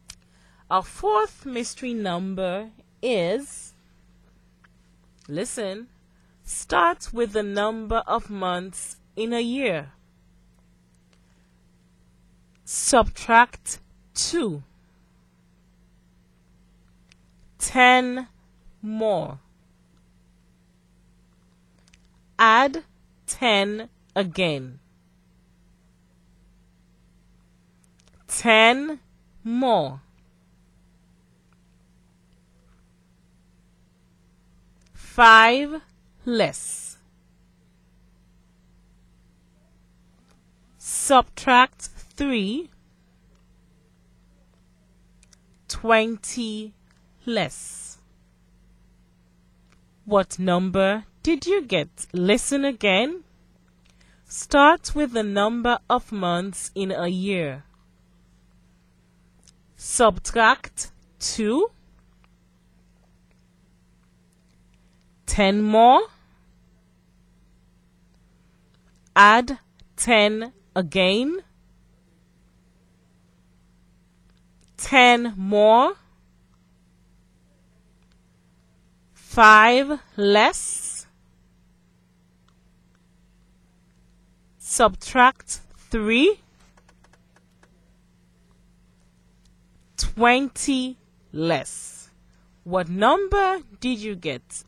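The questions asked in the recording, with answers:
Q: What number did you get?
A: 12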